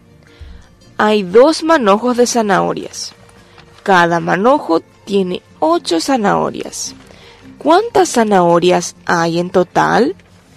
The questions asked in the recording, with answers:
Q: ¿Cuántas zanahorias hay en total?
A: Hay en total 16 zanahorias.